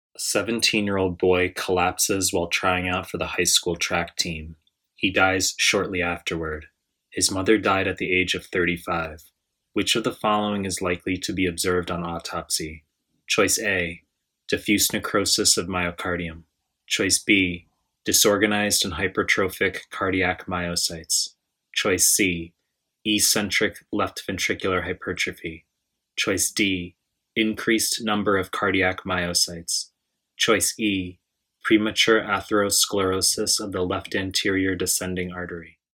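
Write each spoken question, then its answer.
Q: Which of the following is likely to be observed on autopsy?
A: B: disorganized and hypertrophic cardiac myocytes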